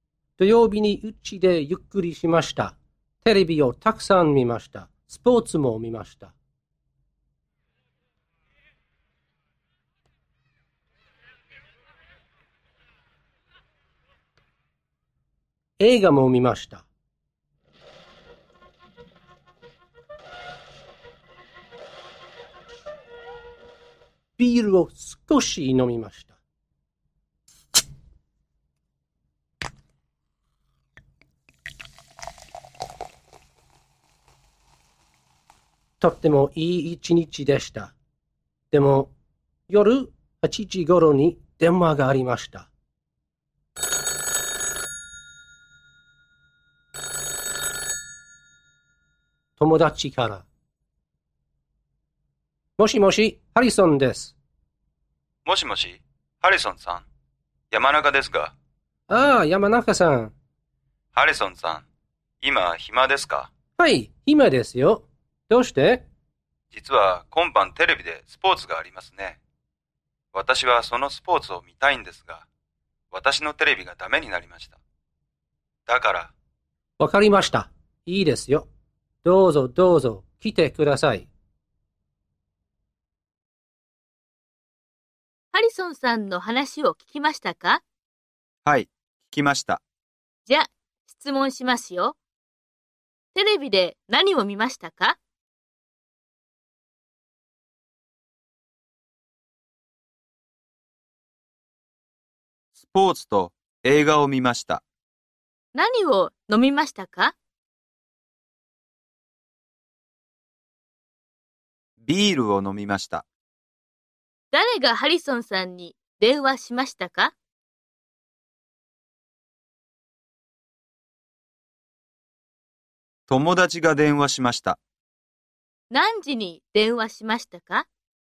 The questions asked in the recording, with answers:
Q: テレビで何を見ましたか?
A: スポーツと映画を見ました。

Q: 何を飲みましたか?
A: ビールを飲みました。

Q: 誰がハリソンさんに電話しましたか?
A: 友達が電話しました。

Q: 何時に電話しましたか?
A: 8時ごろに電話しました。